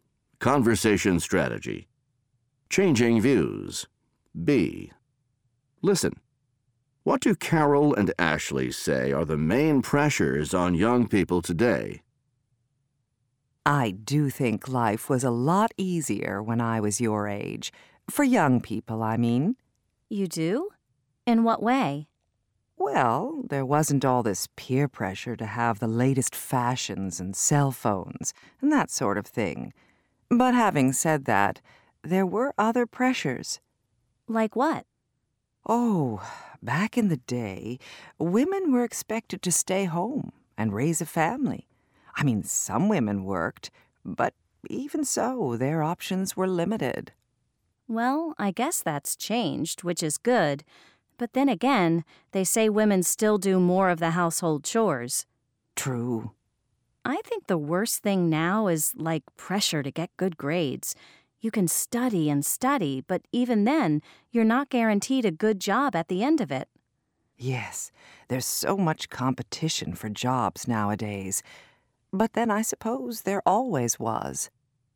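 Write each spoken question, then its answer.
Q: What do Carol and Ashley say are the main pressures on young people today?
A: Peer pressure to have the latest fashions and cell phones, and pressure to get good grades amid competition for jobs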